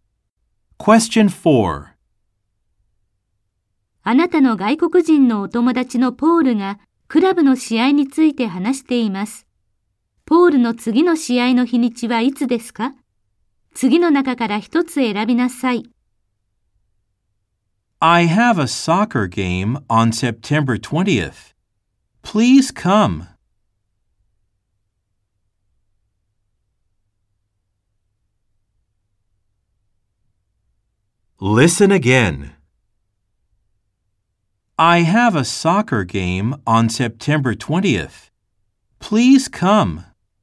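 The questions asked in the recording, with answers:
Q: ポールの次の試合の日にちはいつですか?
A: 9月20日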